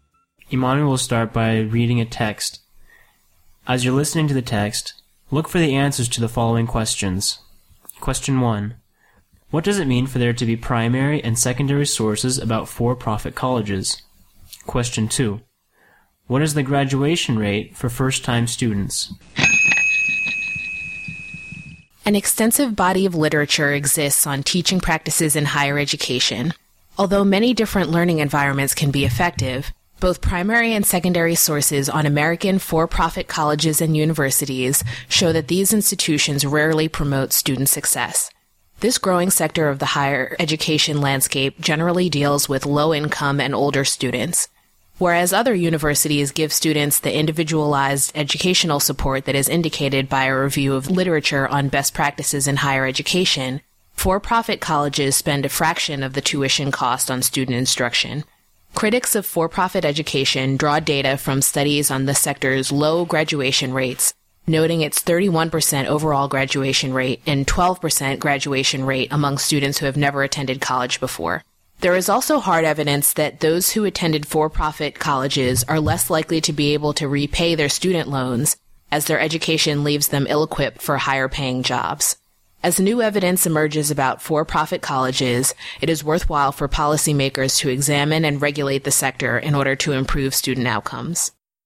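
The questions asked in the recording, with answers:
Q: What is the graduation rate for first-time students?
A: 12%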